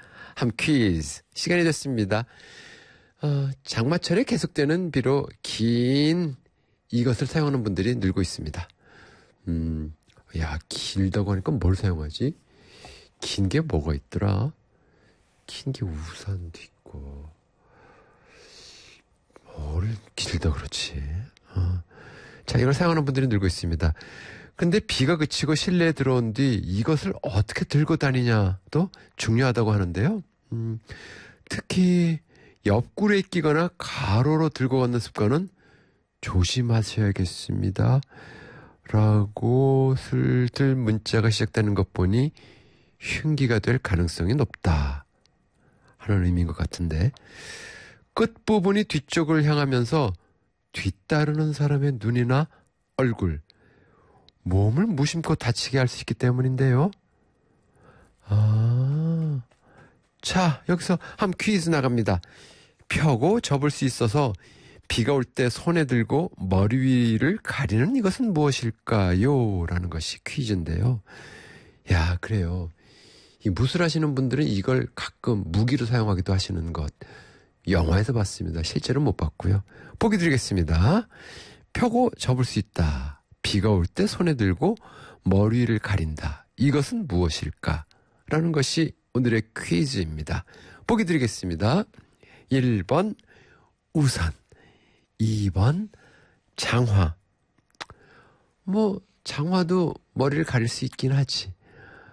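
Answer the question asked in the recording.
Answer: 1번: 우산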